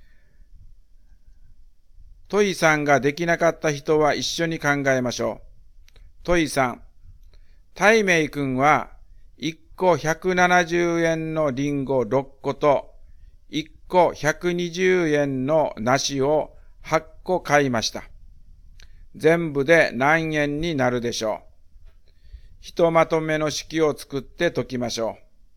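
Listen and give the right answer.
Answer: 1980円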